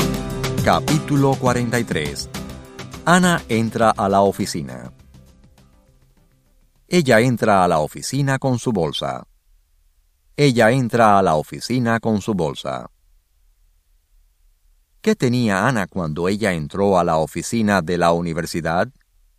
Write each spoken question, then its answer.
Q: ¿Qué tenía Ana cuando ella entró a la oficina de la universidad?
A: Ana tenía su bolsa.